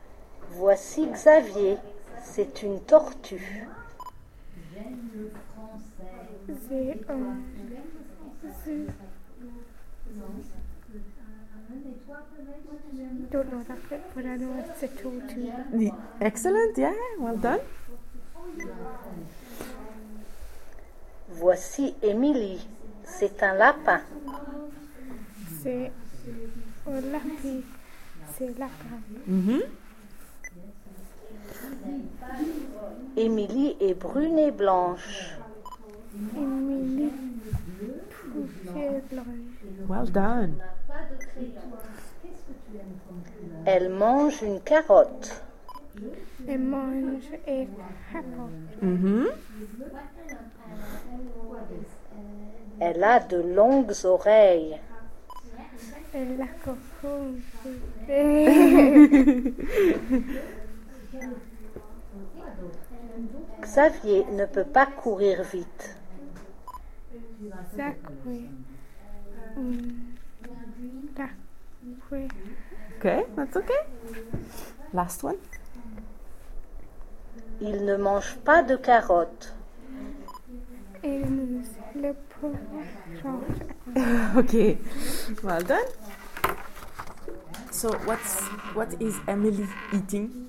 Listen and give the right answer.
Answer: Carrot.